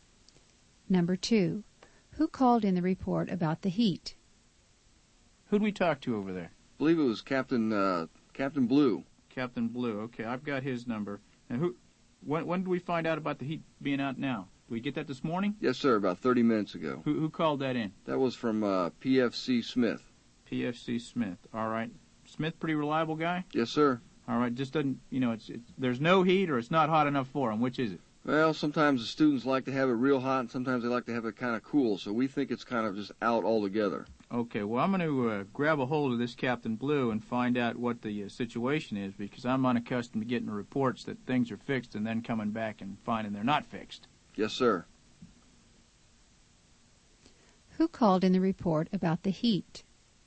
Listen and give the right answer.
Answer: PFC Smith called in the report.